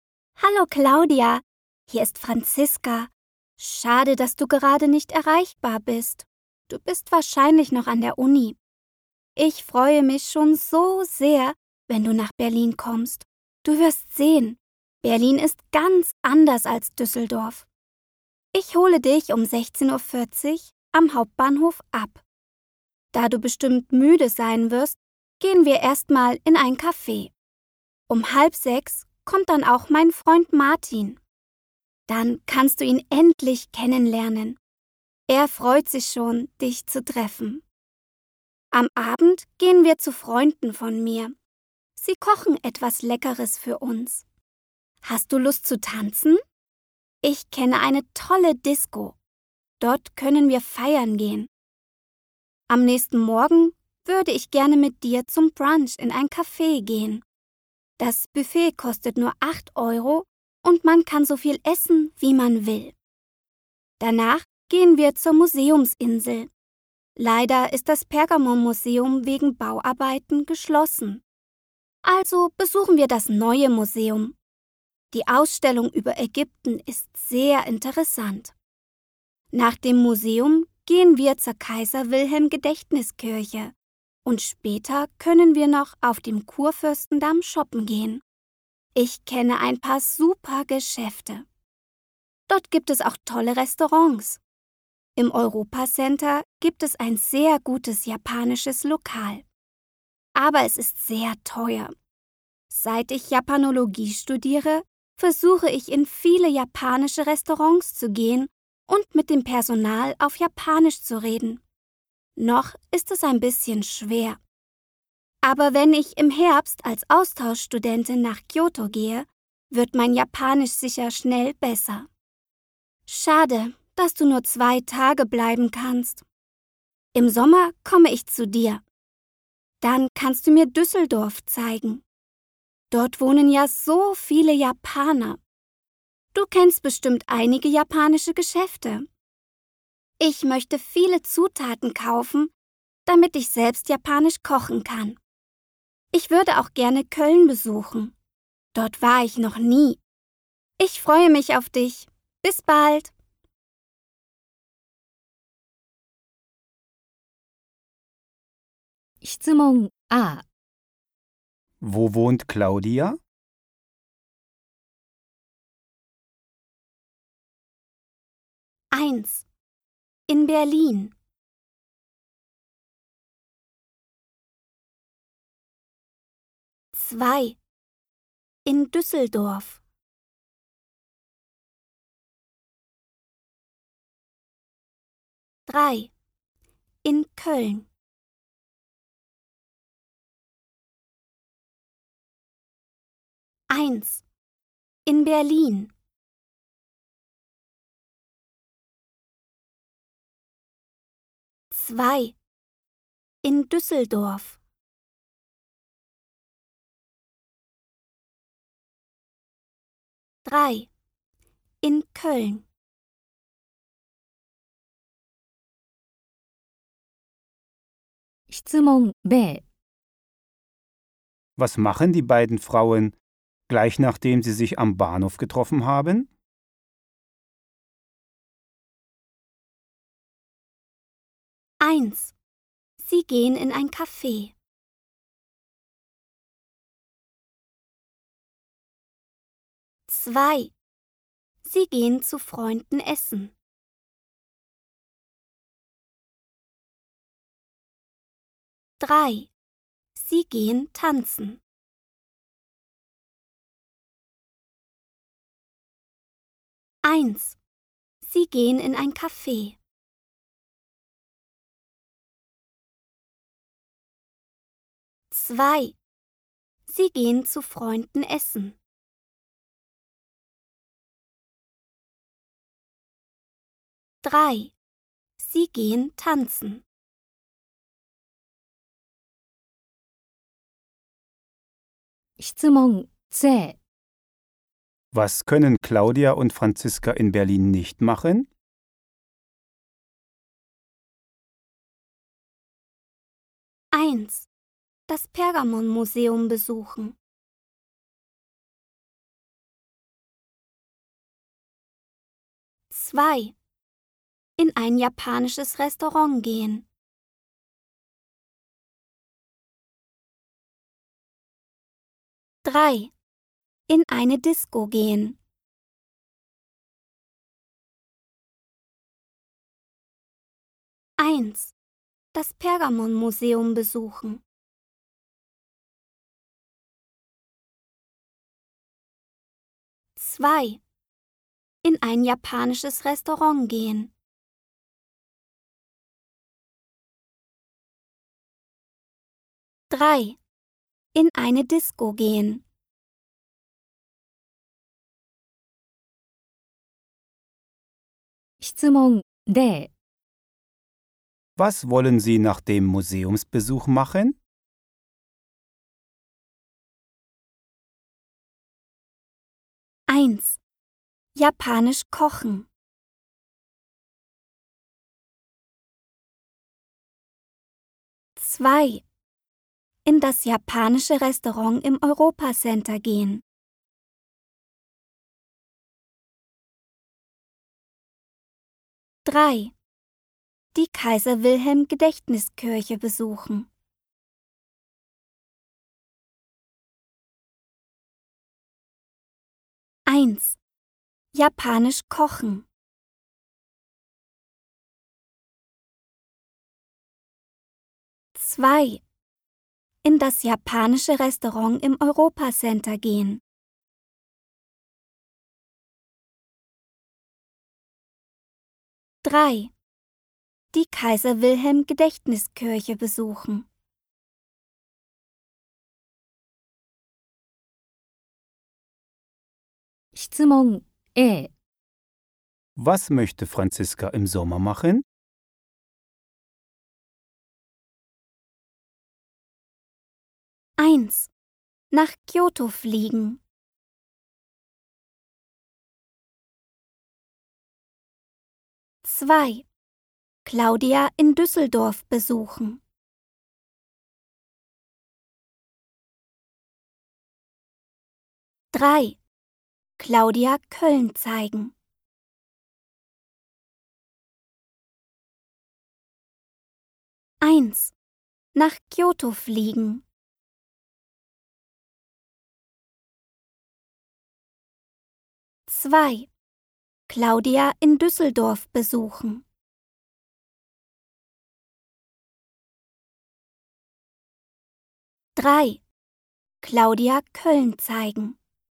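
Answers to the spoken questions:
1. 2: In Düsseldorf
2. 1: Sie gehen in ein Café.
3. 1: Das Pergamonmuseum besuchen.
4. 3: Die Kaiser-Wilhelm-Gedächtniskirche besuchen.
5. 2: Claudia in Düsseldorf besuchen.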